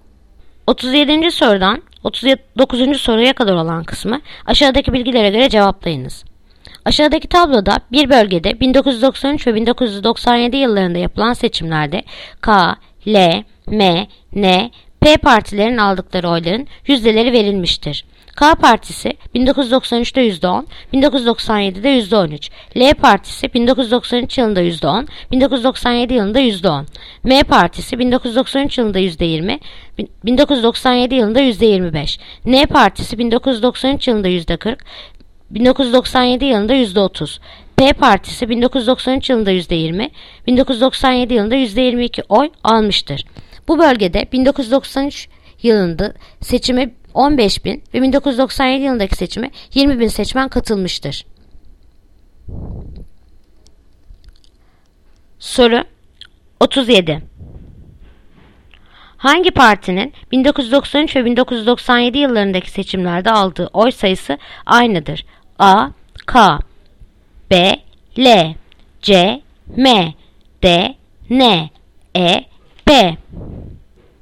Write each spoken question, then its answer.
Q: Hangi partinin 1993 ve 1997 yıllarındaki seçimlerde aldığı oy sayısı aynıdır?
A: Yanıt Diyarbakır. Ne?